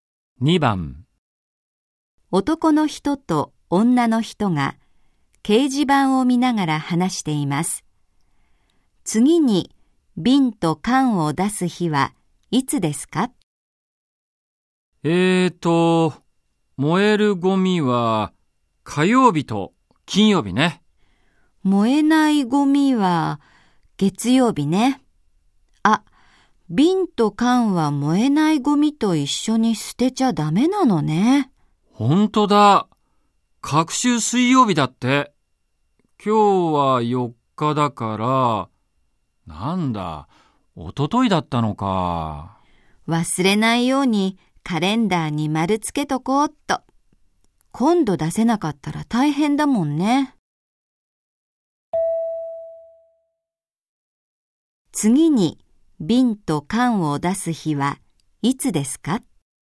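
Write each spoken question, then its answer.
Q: 次に、瓶と缶を出す日はいつですか?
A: 16日(水曜日)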